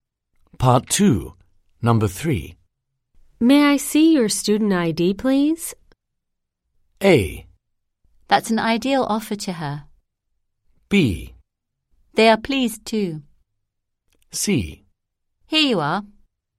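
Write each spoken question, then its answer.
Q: May I see your student ID, please?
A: C: Here you are.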